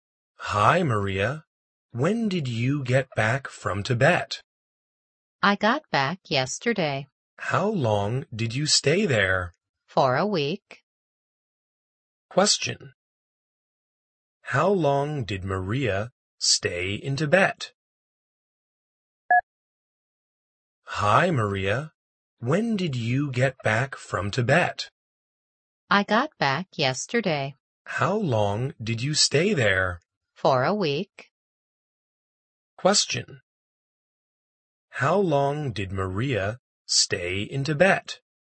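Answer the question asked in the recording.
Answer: For a week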